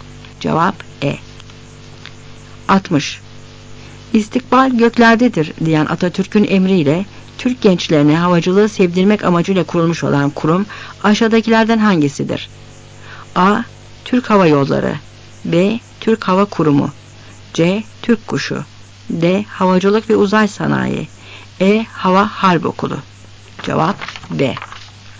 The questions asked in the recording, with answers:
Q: İstikbal göklerdedir diyen Atatürk'ün emriyle Türk gençlerine havacılığı sevdirmek amacıyla kurulmuş olan kurum aşağıdakilerden hangisidir?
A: Cevap B.